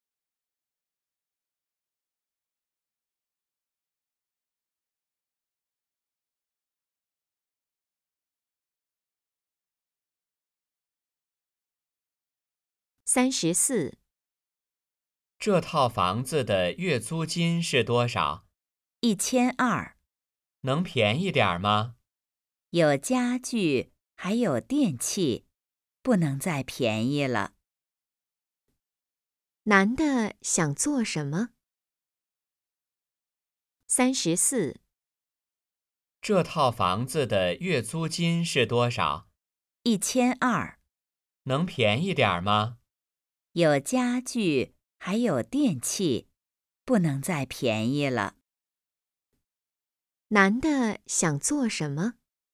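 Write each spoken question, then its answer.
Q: 男的想做什么?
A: 租房子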